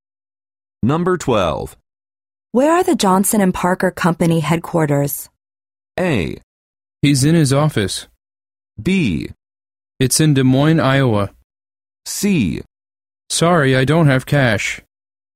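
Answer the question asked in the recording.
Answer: B: It's in Des Moines, Iowa.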